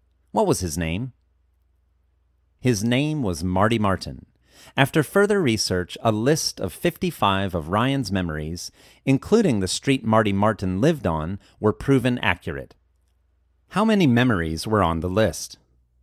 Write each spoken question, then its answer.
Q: How many memories were on the list?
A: 55 memories were on the list.